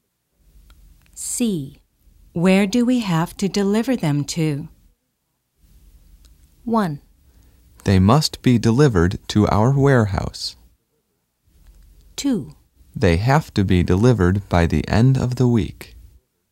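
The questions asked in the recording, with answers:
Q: Where do we have to deliver them to?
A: 1: They must be delivered to our warehouse.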